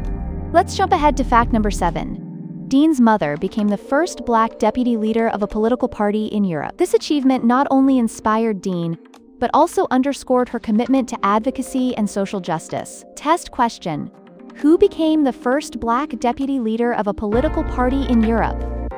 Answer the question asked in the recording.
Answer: Correct answer, Dean's mother.